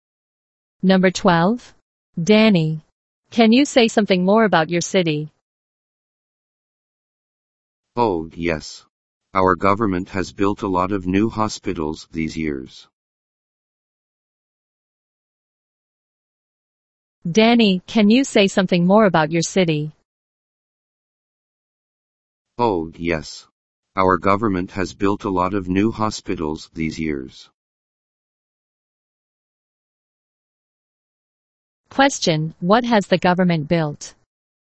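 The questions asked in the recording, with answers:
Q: Question, what has the government built?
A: A lot of new hospitals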